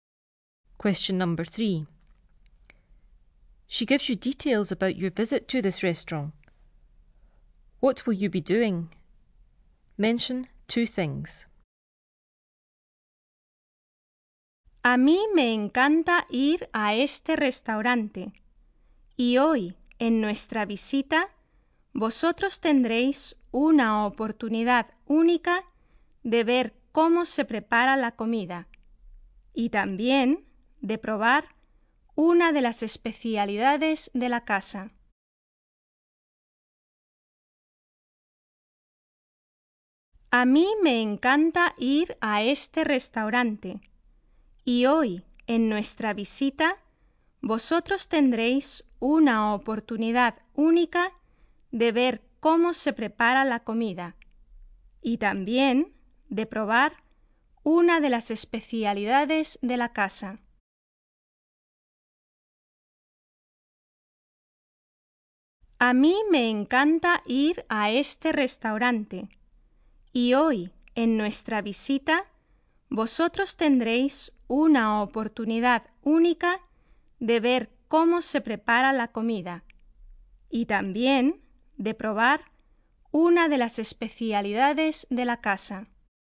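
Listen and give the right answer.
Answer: See how the food is prepared; taste one of the house specialities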